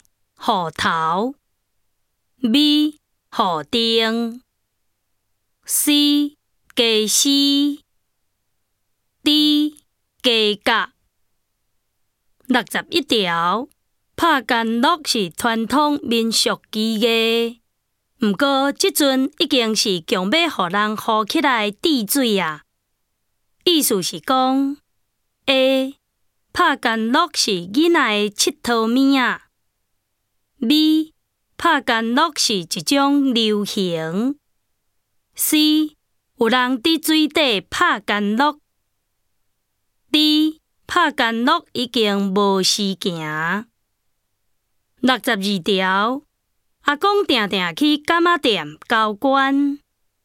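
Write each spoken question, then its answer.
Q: 意思是讲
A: D: 拍干酪已经无时行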